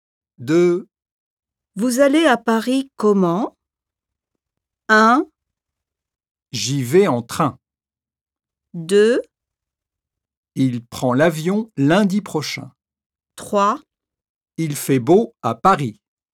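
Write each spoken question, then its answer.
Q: Vous allez à Paris comment?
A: 1: J'y vais en train.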